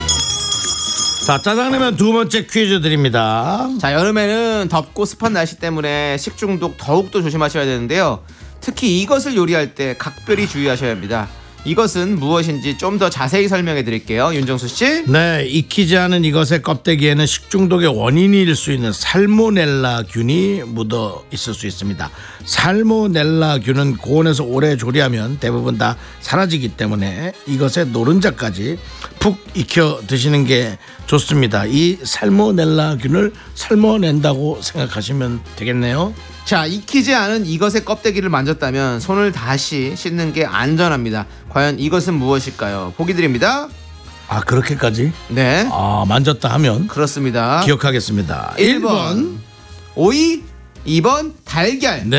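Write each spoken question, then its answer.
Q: 과연 이것은 무엇일까요?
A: 2번: 달걀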